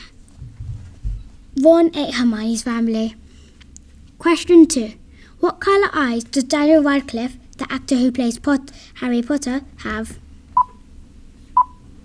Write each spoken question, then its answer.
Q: What colour eyes does Daniel Radcliffe, the actor who plays Harry Potter, have?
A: The answer is blue eyes.